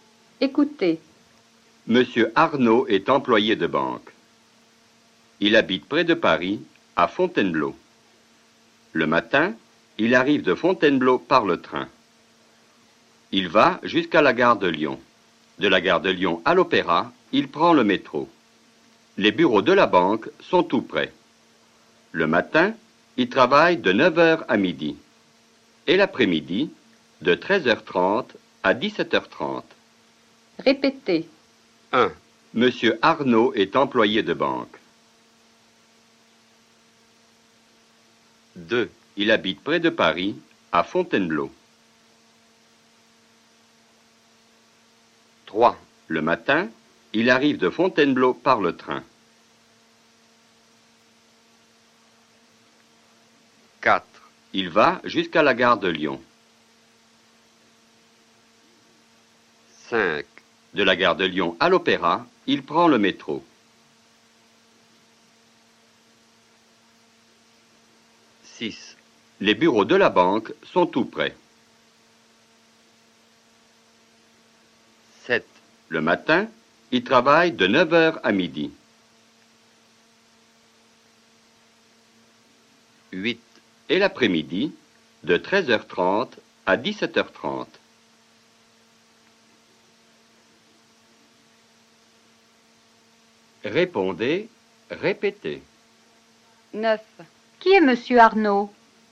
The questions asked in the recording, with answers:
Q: Qui est Monsieur Arnaud?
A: Monsieur Arnaud est employé de banque.